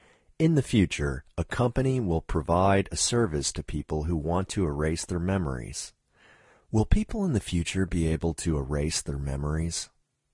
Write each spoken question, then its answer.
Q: Will people in the future be able to erase their memories?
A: Yes, people in the future will be able to erase their memories.